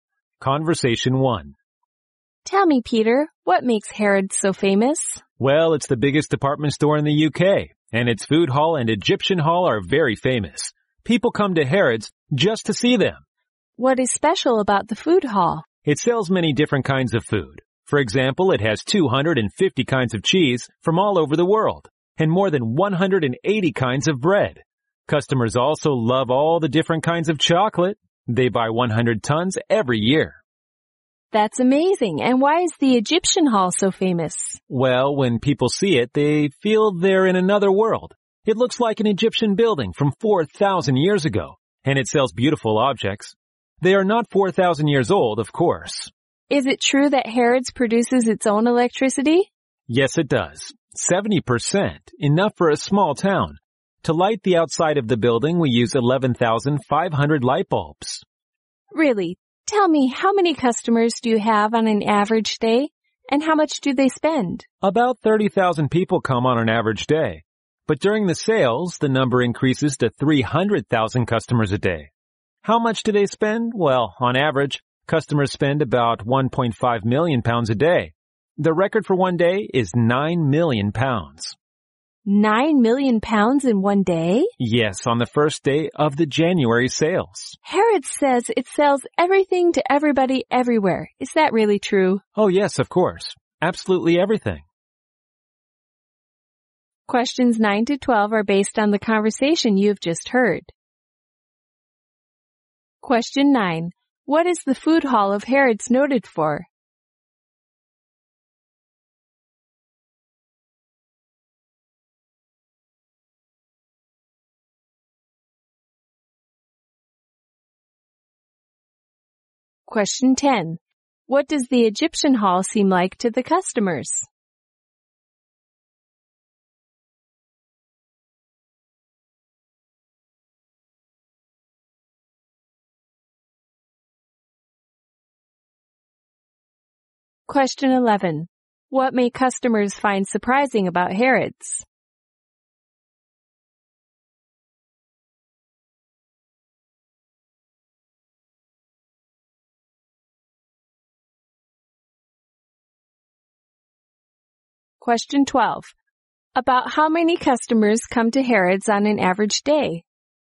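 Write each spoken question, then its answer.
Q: What is the Food Hall of Harrods noted for?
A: Its wide variety of food.

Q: What does the Egyptian Hall seem like to the customers?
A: Like another world.

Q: About how many customers come to Harrods on an average day?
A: About 30,000.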